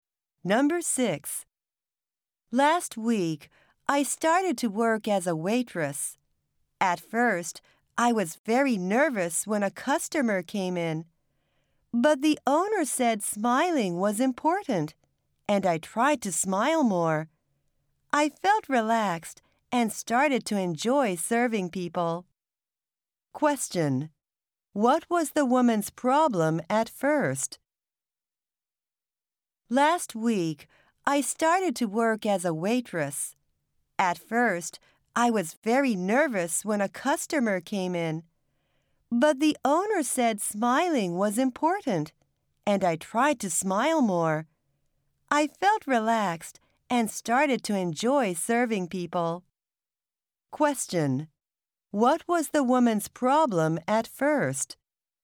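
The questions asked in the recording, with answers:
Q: What was the woman's problem at first?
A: She was very nervous when a customer came in.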